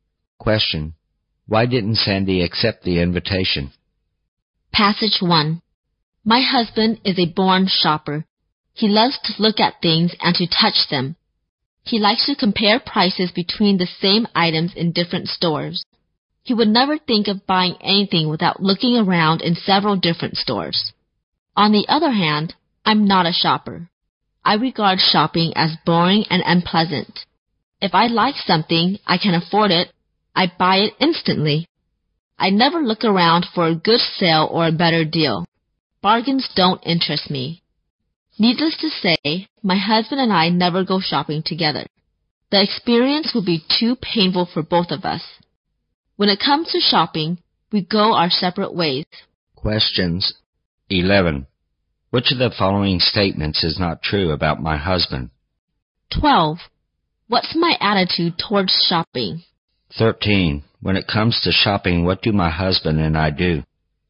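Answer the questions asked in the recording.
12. She finds it boring and unpleasant.
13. They go their separate ways.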